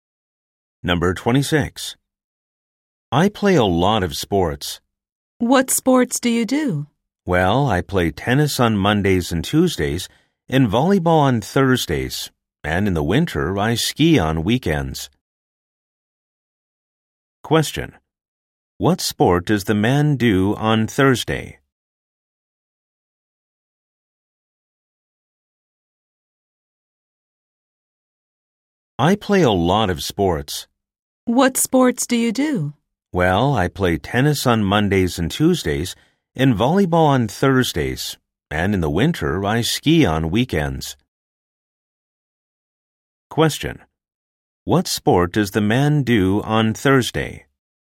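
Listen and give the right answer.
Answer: Volleyball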